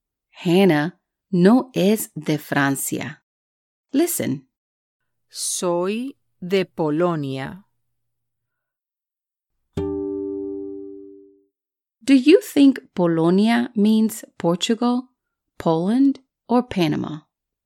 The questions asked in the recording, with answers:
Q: Do you think Polonia means Portugal, Poland, or Panama?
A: Correcto. Hannah is from Poland.